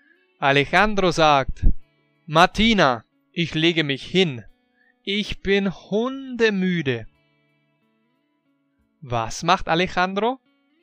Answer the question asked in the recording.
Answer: Er legt sich hin, weil er hundemüde ist.